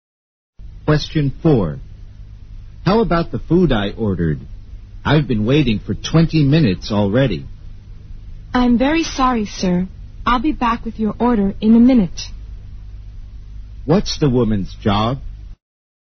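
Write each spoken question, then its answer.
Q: What's the woman's job?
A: A waitress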